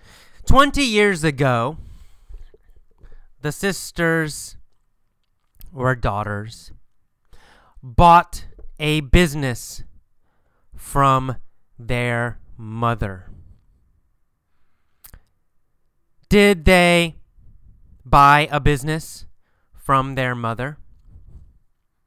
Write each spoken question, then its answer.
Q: Did they buy a business from their mother?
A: Yes, they did.